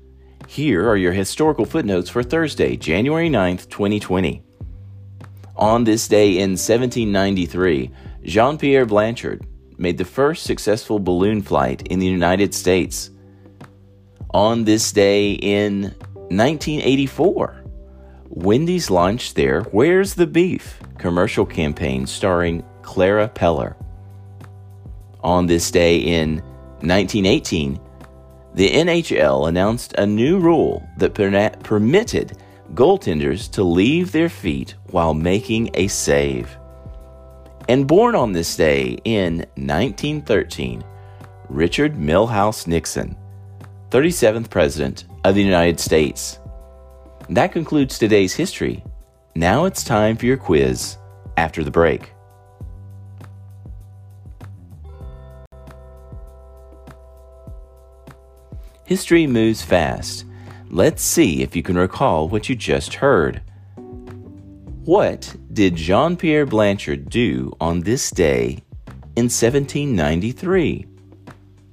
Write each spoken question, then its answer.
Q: What did Jean-Pierre Blanchard do on this day in 1793?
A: Jean-Pierre Blanchard made the first successful balloon flight in the United States on this day in 1793.